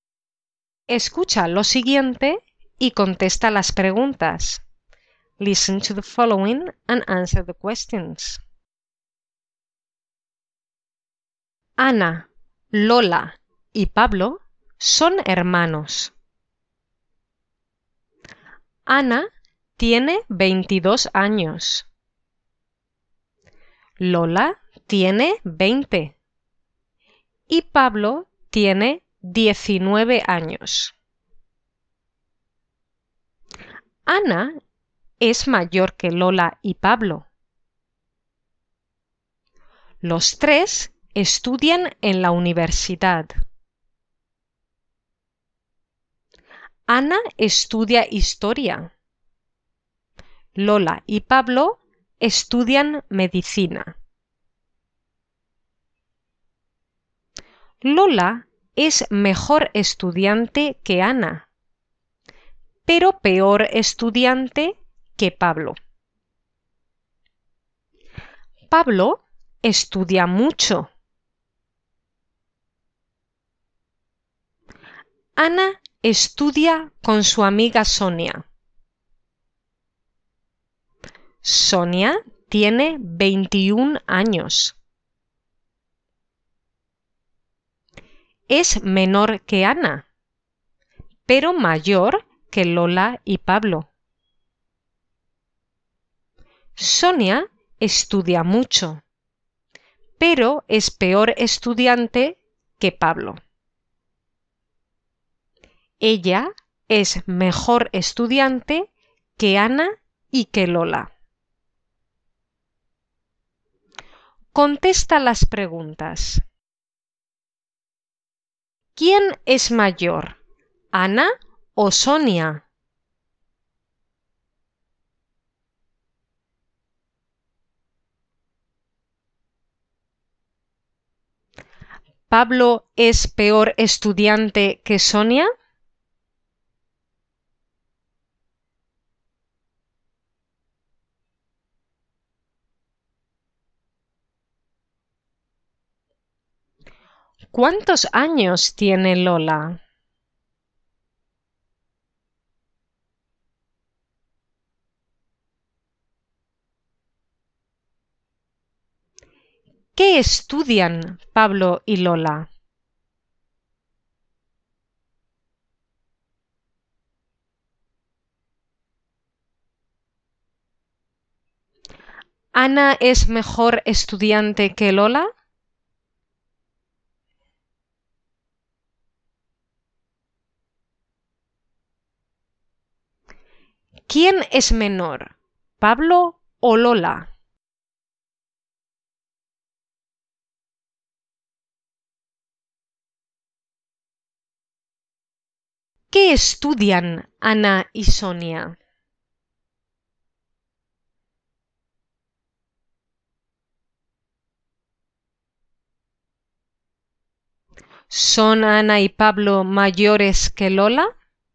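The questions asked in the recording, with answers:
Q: ¿Quién es mayor, Ana o Sonia?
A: Ana

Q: ¿Pablo es peor estudiante que Sonia?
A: No, Pablo es mejor estudiante que Sonia

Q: ¿Cuántos años tiene Lola?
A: 20 años

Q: ¿Qué estudian Pablo y Lola?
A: Medicina

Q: ¿Ana es mejor estudiante que Lola?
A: No, Lola es mejor estudiante que Ana

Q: ¿Quién es menor, Pablo o Lola?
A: Pablo

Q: ¿Son Ana y Pablo mayores que Lola?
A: No, Ana es mayor que Lola pero Pablo es menor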